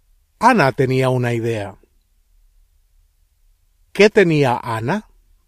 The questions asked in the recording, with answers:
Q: ¿Qué tenía Ana?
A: Una idea.